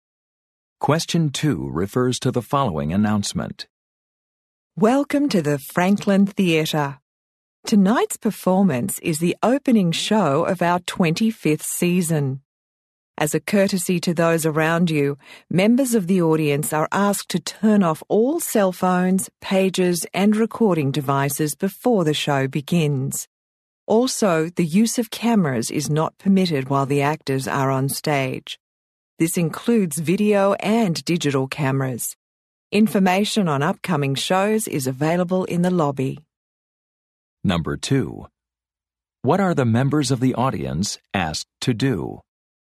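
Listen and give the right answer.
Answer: Turn off cell phones, pagers and recording devices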